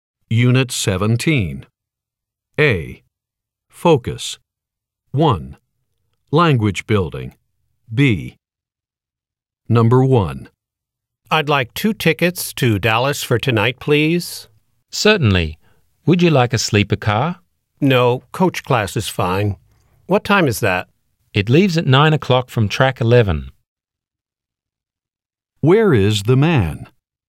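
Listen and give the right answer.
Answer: At a train station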